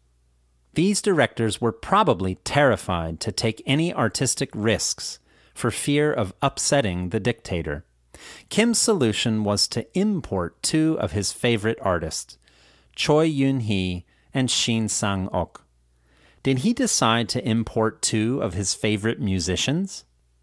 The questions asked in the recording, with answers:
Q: Did he decide to import two of his favorite musicians?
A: No, he didn't decide to import two of his favorite musicians.